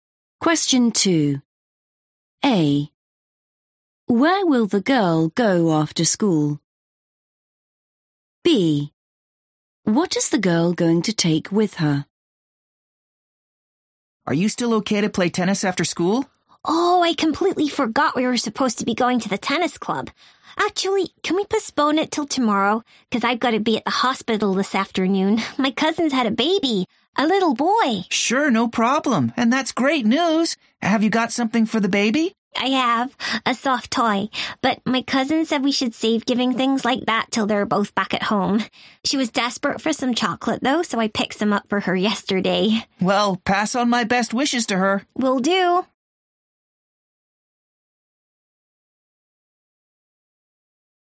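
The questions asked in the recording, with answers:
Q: Where will the girl go after school?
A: the hospital

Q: What is the girl going to take with her?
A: chocolate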